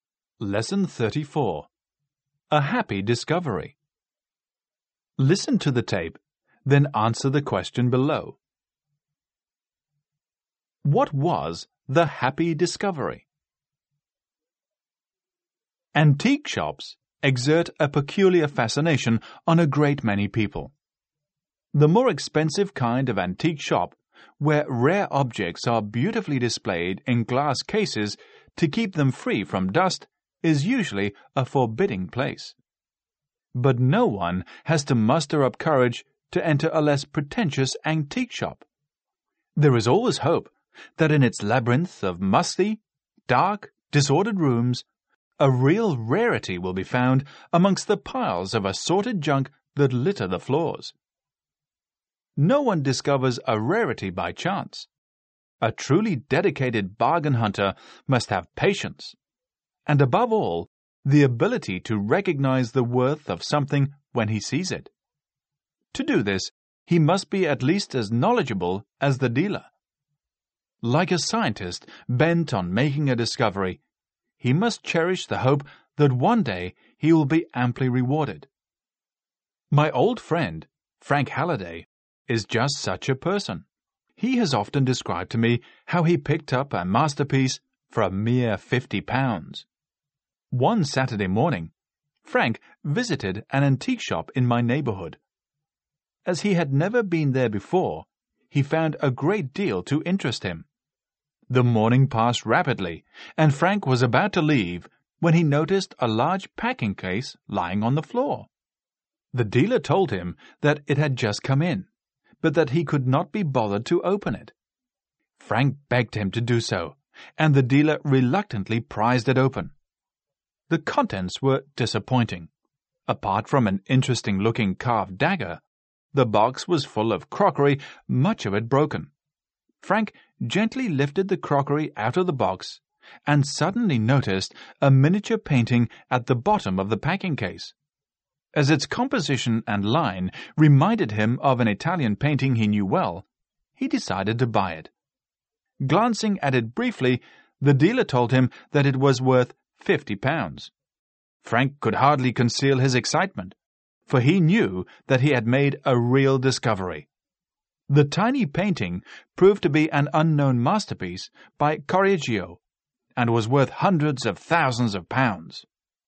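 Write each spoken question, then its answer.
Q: What was the happy discovery?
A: A miniature painting in a packing case that proved to be an unknown masterpiece by Correggio, bought for £50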